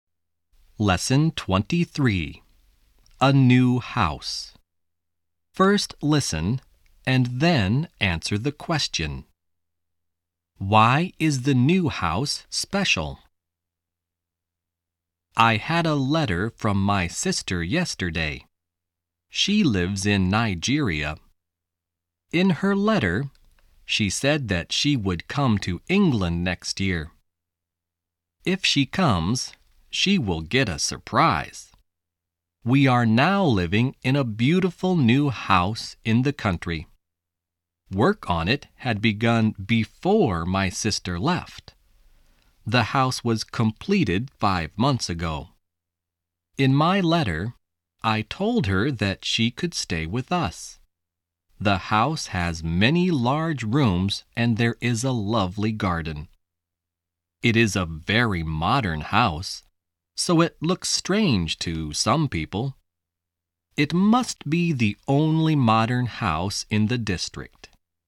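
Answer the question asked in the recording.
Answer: It is very modern; it must be the only modern house in the district.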